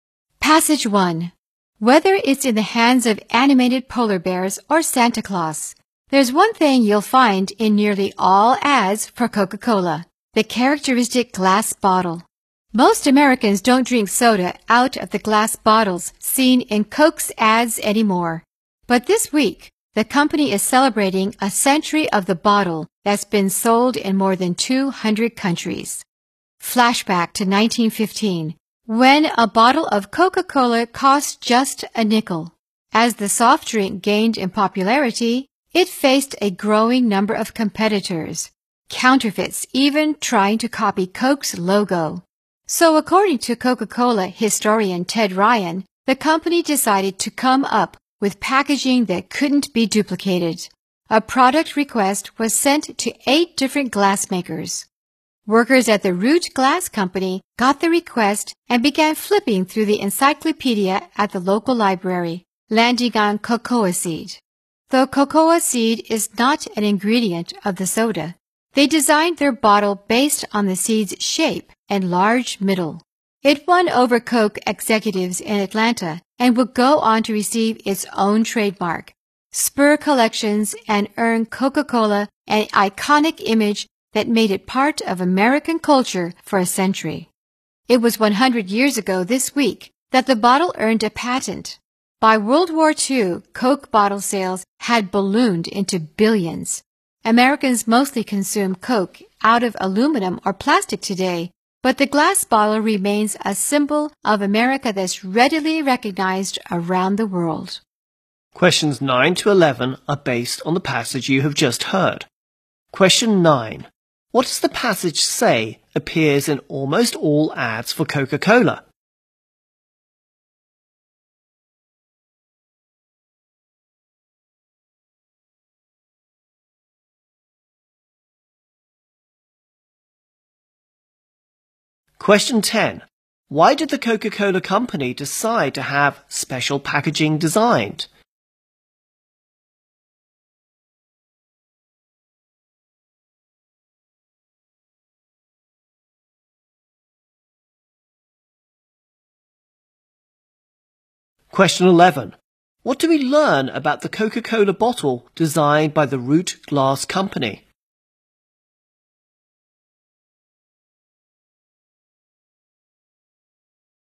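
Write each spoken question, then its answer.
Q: What does the passage say appears in almost all ads for Coca-Cola?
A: The characteristic glass bottle.

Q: Why did the Coca-Cola company decide to have special packaging designed?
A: To fight competitors and counterfeits with packaging that couldn't be duplicated.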